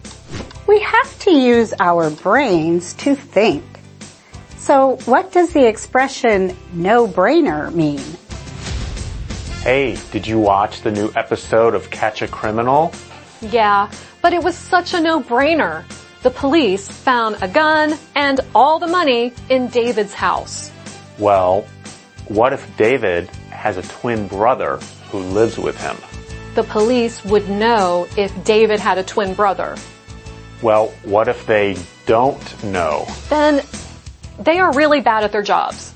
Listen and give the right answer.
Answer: A no-brainer is something that requires little thought or is obvious.